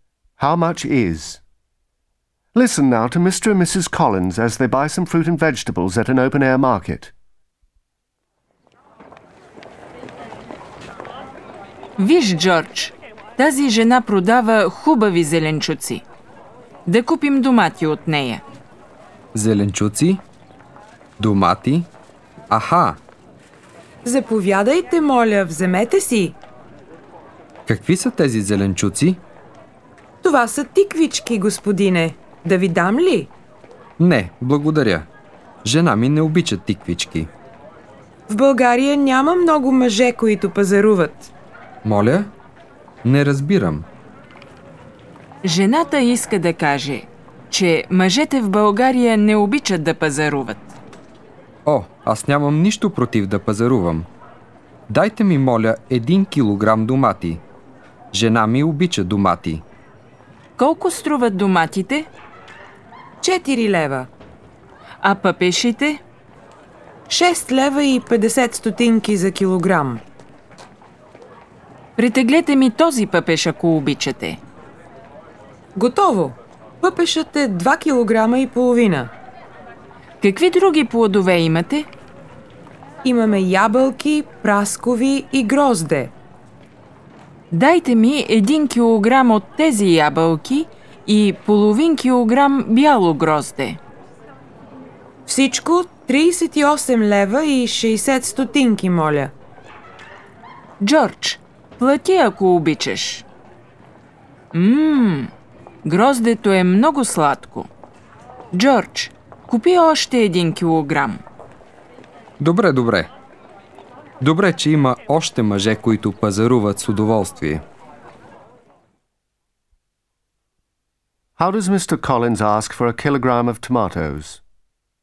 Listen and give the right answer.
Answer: Дайте ми, моля, 1 килограм домати.